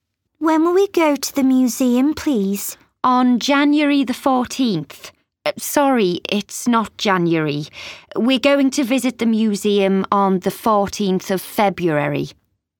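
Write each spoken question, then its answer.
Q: When will we go to the museum, please?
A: The 14th of February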